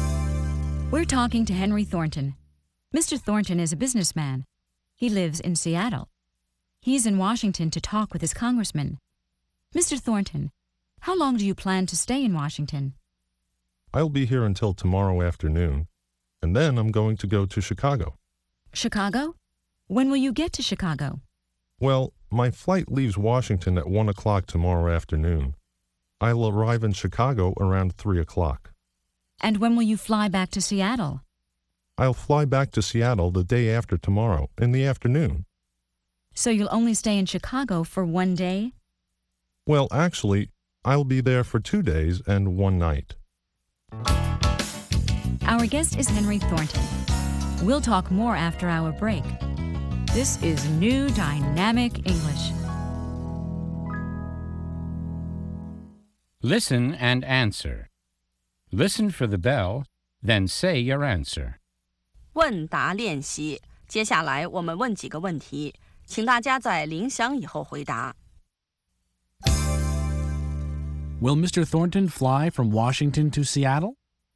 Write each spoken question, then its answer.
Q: Will Mr. Thornton fly from Washington to Seattle?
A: No, he won't. First, he'll fly to Chicago.